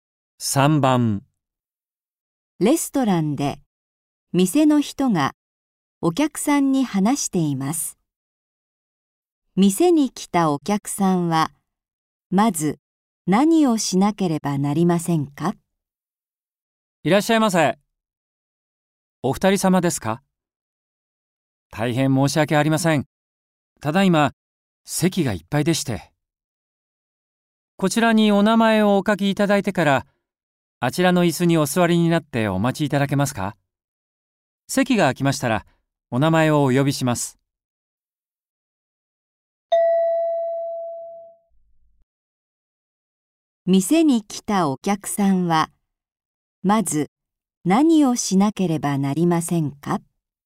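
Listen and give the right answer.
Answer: 名前を書く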